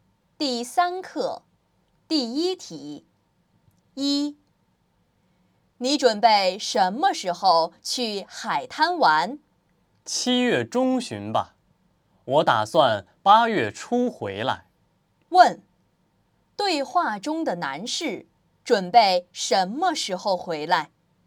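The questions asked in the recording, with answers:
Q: 对话中的男士准备什么时候回来?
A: 八月初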